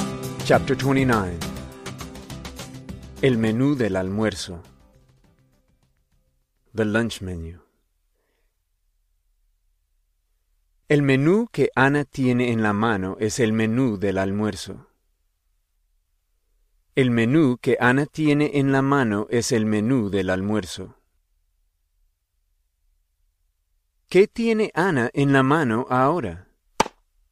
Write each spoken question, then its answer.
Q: ¿Qué tiene Ana en la mano ahora?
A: Ana tiene el menú del almuerzo en la mano ahora.